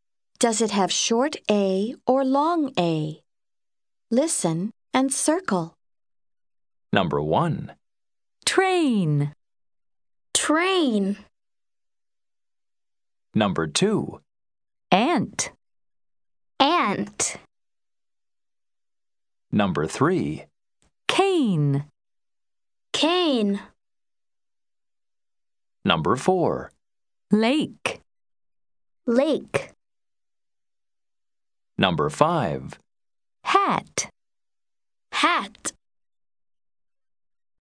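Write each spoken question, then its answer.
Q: Train.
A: long A

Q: Cane.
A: long A

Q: Lake.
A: long A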